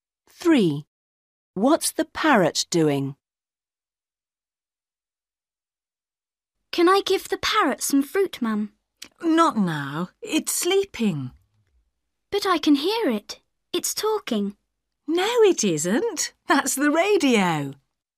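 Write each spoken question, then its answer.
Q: What's the parrot doing?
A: Sleeping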